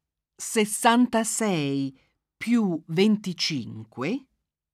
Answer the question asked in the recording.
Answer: fa 91.